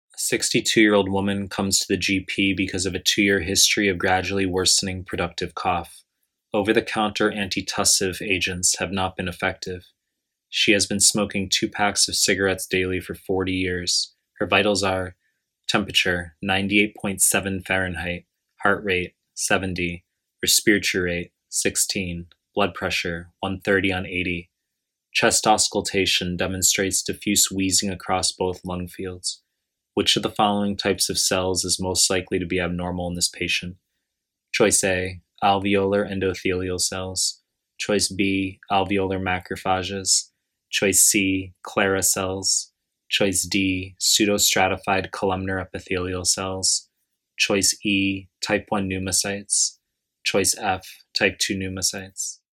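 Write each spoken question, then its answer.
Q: Which of the following types of cells is most likely to be abnormal in this patient?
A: D: pseudostratified columnar epithelial cells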